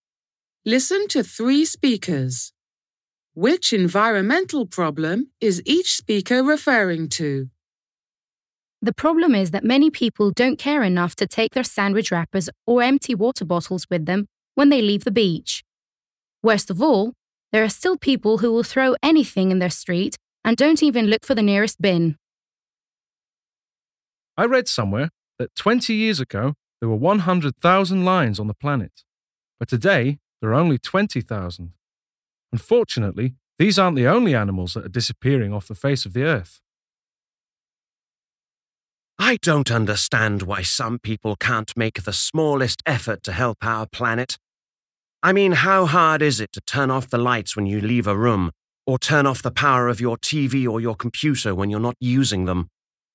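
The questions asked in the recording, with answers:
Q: Which environmental problem is each speaker referring to?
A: Litter

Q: Which environmental problem is each speaker referring to?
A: Endangered animals

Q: Which environmental problem is each speaker referring to?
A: Wasting energy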